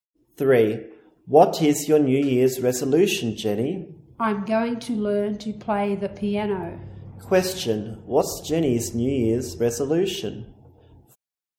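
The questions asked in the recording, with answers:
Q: What's Jenny's New Year's resolution?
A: To learn to play the piano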